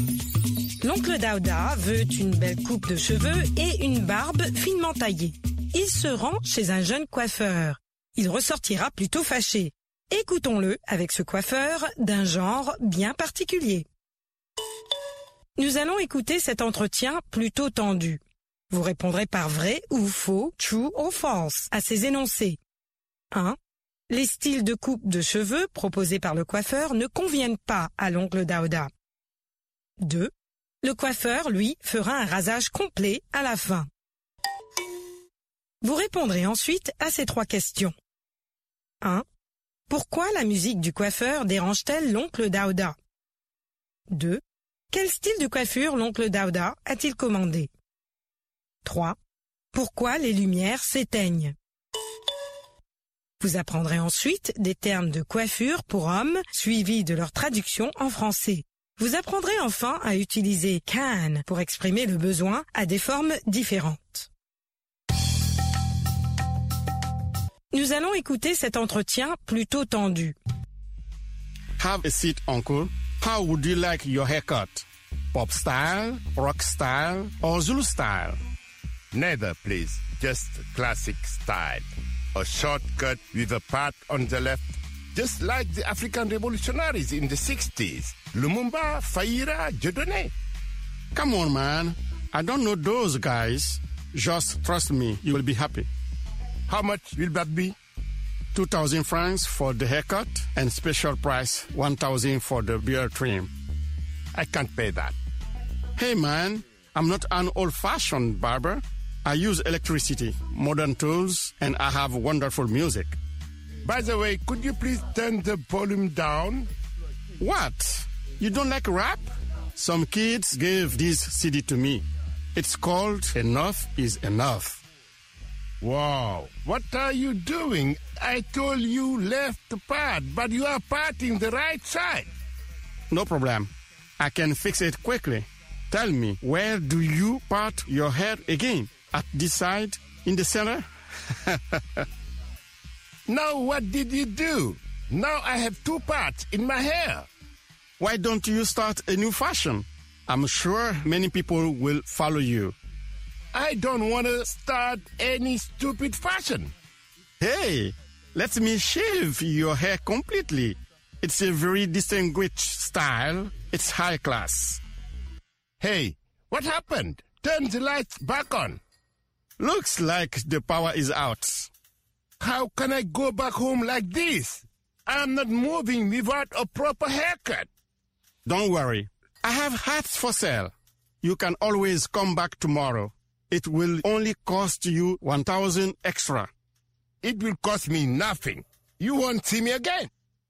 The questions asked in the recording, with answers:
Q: Les styles de coupe de cheveux proposés par le coiffeur ne conviennent pas à l'oncle Daouda.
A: L'énoncé 1 est vrai.

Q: Le coiffeur, lui, fera un rasage complet à la fin.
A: L'énoncé 2 est faux.

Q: Pourquoi la musique du coiffeur dérange-t-elle l'oncle Daouda?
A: Le volume est trop fort.

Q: Quel style de coiffure l'oncle Daouda a-t-il commandé?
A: Une coupe courte avec une raie sur le côté gauche.